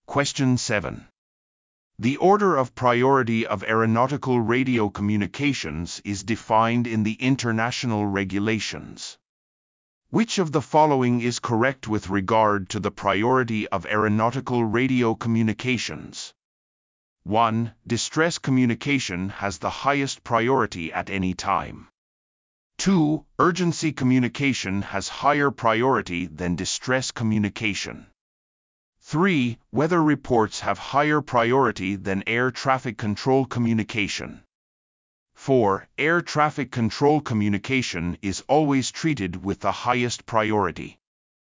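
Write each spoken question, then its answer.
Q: Which of the following is correct with regard to the priority of aeronautical radio communications?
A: 1: Distress communication has the highest priority at any time.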